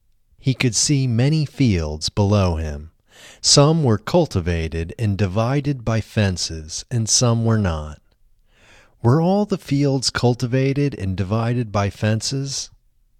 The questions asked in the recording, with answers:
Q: Were all the fields cultivated and divided by fences?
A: No, not all the fields were cultivated and divided by fences.